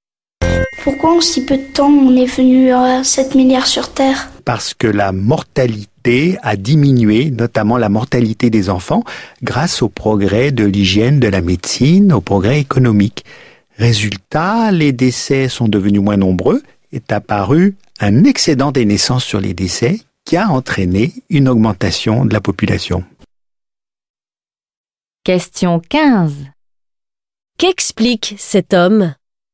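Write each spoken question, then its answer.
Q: Qu'explique cet homme ?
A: Pourquoi la population mondiale a augmenté si vite (baisse de la mortalité)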